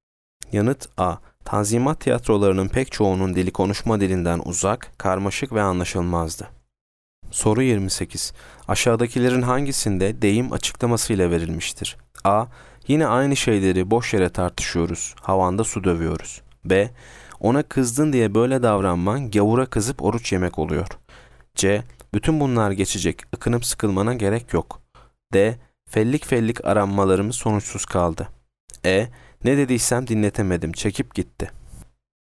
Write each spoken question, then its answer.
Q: Aşağıdakilerin hangisinde deyim açıklamasıyla verilmiştir?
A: Yanıt A. Yine aynı şeyleri boş yere tartışıyoruz, havanda su dövüyoruz.